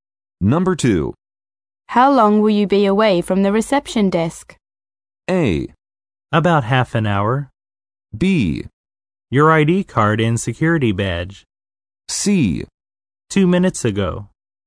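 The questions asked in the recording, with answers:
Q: How long will you be away from the reception desk?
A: A: About half an hour.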